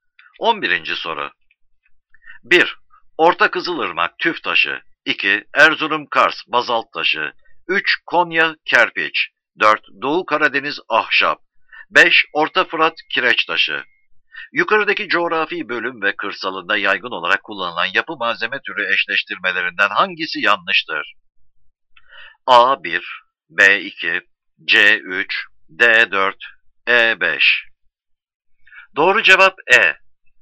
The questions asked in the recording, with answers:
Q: Yukarıdaki coğrafi bölüm ve kırsalında yaygın olarak kullanılan yapı malzeme türü eşleştirmelerinden hangisi yanlıştır?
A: Doğru cevap E.